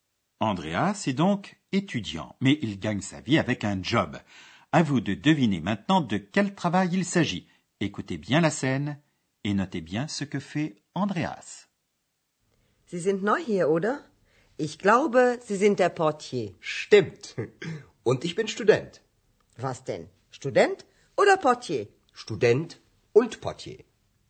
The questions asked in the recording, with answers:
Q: Écoutez bien la scène et notez bien ce que fait Andreas.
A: Il gagne sa vie comme réceptionniste, comme portier.